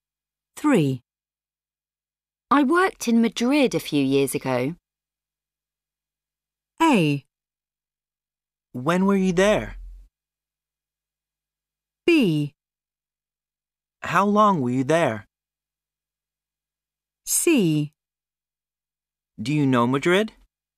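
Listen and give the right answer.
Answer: B: How long were you there?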